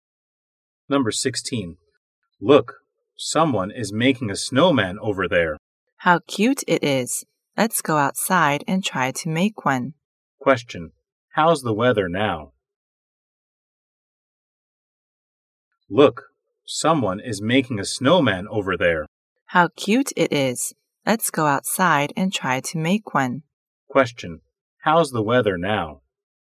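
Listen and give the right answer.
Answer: Snowy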